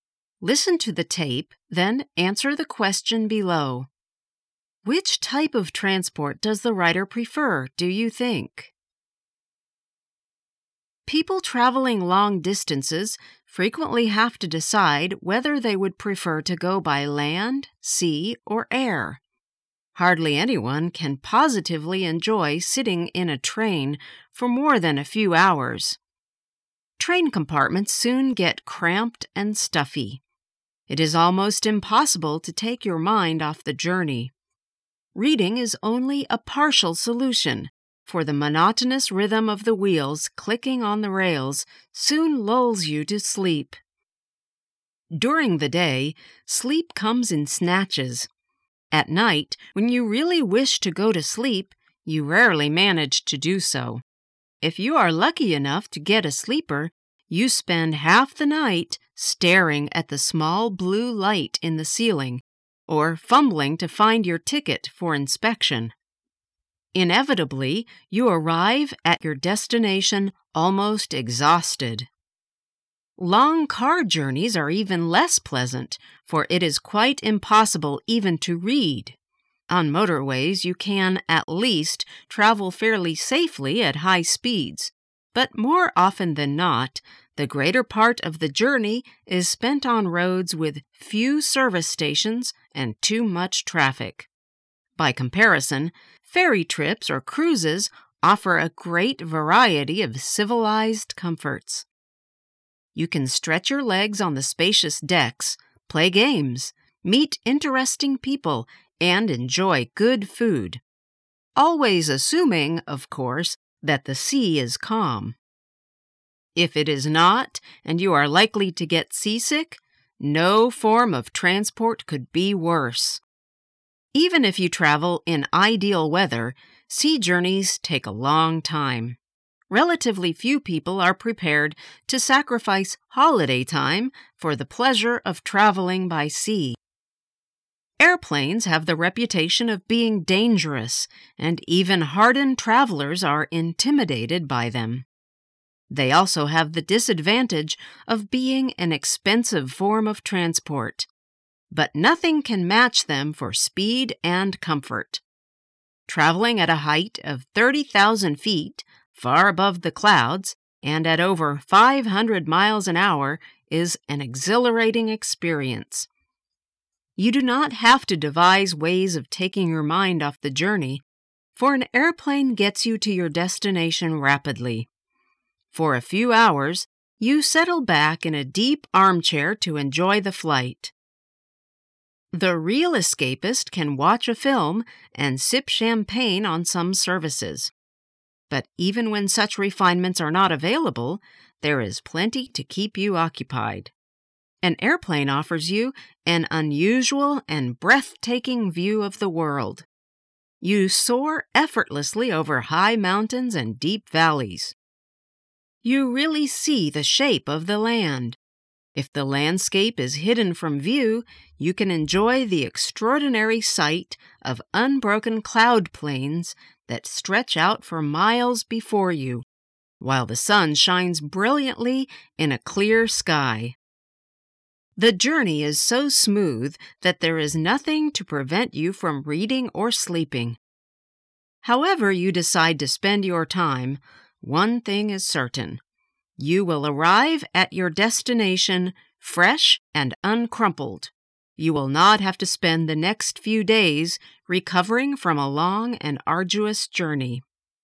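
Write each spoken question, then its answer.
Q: Which type of transport does the rider prefer, do you think?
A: Air travel (airplanes)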